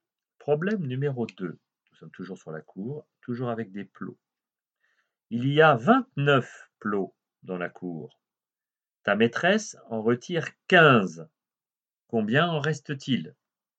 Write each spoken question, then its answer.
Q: Combien en reste-t-il?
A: Réponse attendue, 14.